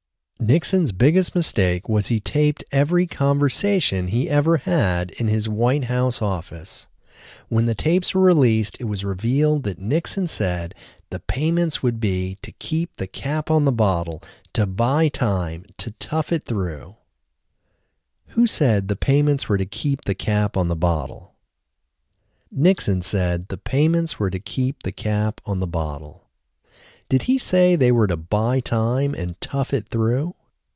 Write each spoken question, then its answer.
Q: Did he say they were to buy time and tough it through?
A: Yes, he also said they were to buy time and tough it through.